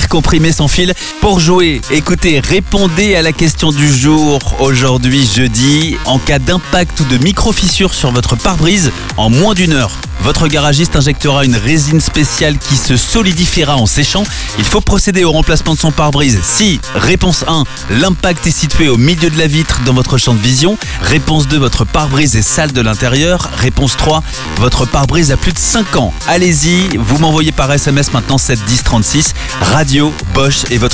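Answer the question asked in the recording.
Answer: 1: l'impact est situé au milieu de la vitre dans votre champ de vision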